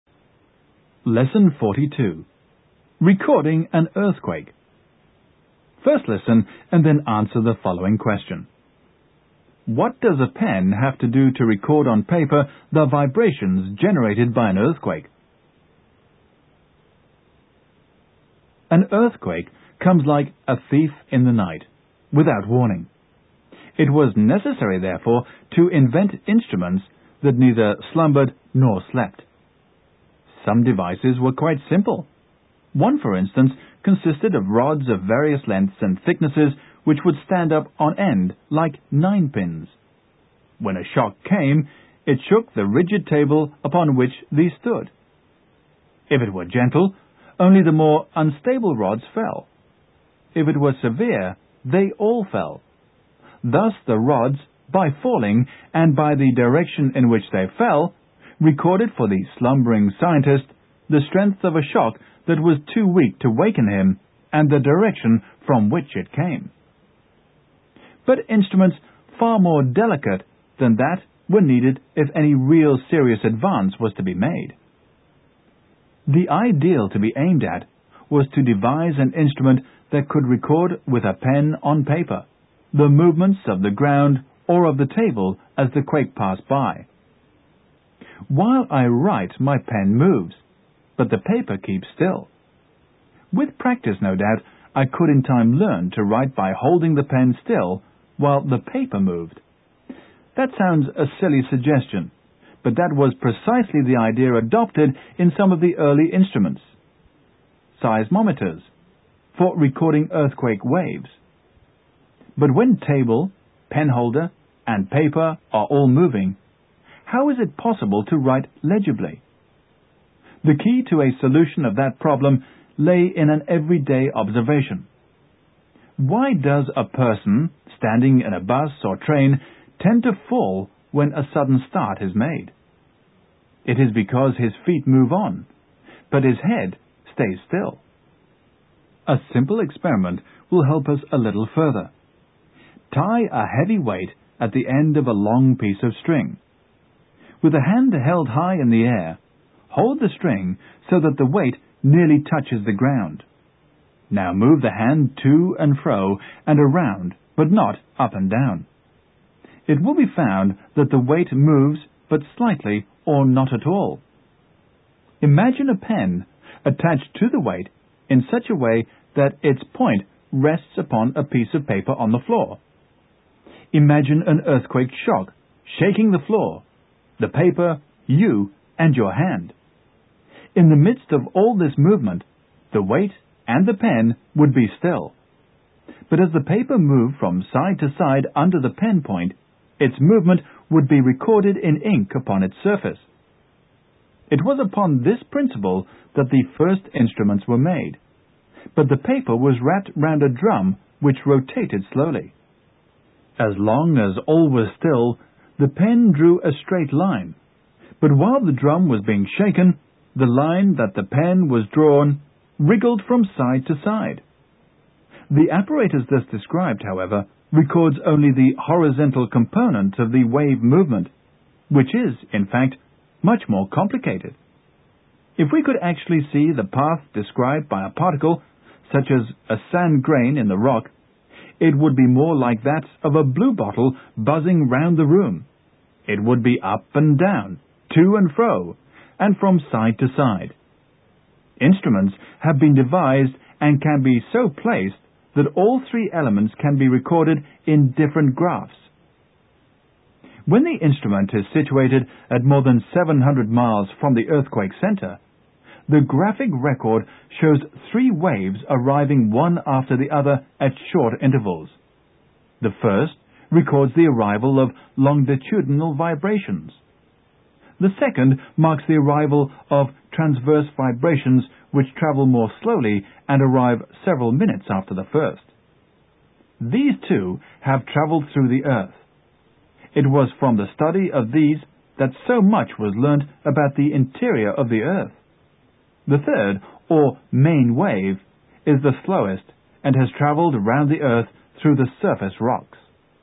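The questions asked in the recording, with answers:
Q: What does a pen have to do to record on paper the vibrations generated by an earthquake?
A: It must stay still while the paper moves beneath it.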